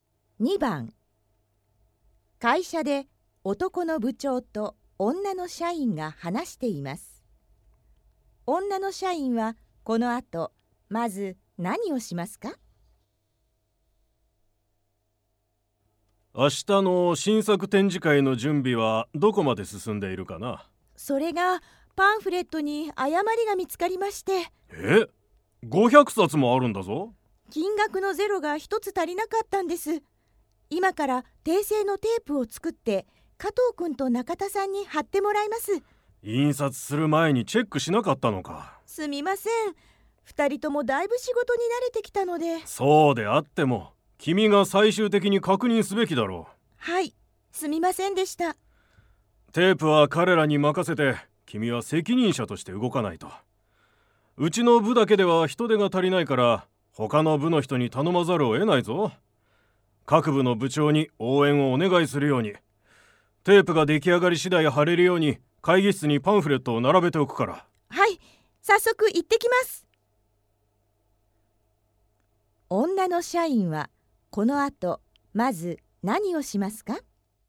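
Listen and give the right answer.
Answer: 他の部の部長に応援を頼みに行く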